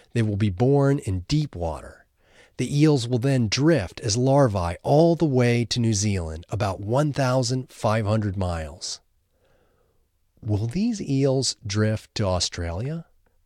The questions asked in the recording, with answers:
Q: Will these eels drift to Australia?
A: No, they won't drift to Australia.